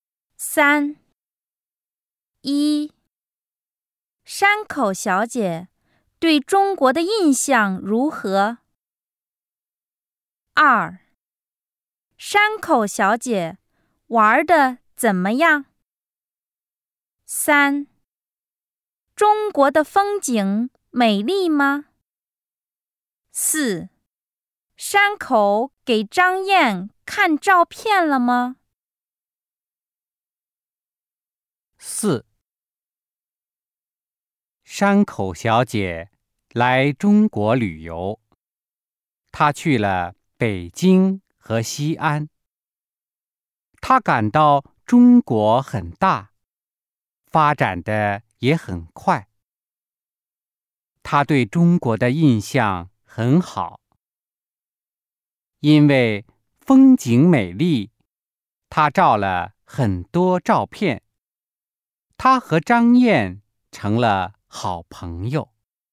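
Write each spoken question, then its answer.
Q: 山口小姐对中国的印象如何?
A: 很好

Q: 中国的风景美丽吗?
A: 美丽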